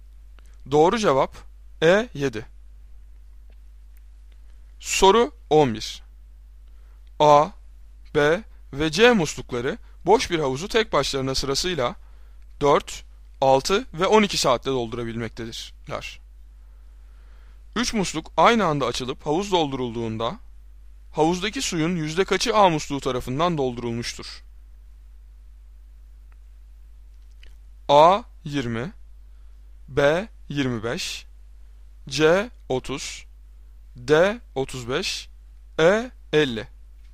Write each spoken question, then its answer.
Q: 3 musluk aynı anda açılıp havuz doldurulduğunda havuzdaki suyun yüzde kaçı A musluğu tarafından doldurulmuştur?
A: Doğru cevap E 50.